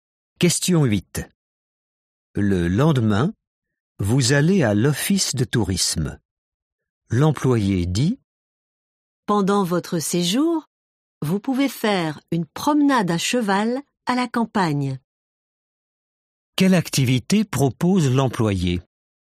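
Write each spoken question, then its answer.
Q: Quelle activité propose l'employé ?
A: une promenade à cheval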